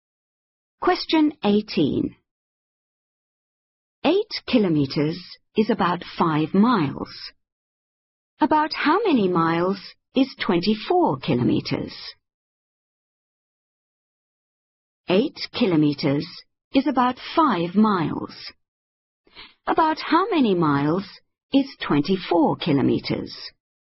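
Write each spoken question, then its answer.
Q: About how many miles is 24 kilometers?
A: 15 miles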